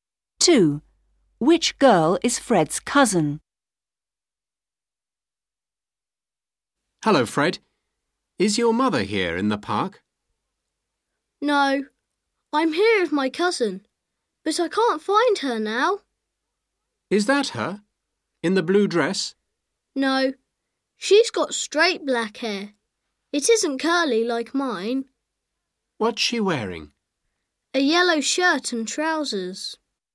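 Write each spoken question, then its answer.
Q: Which girl is Fred's cousin?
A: the girl with straight black hair, a yellow shirt and trousers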